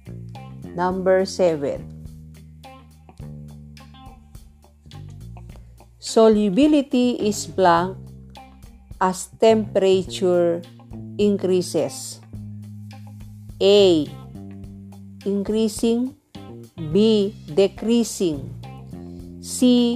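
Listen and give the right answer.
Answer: A: Increasing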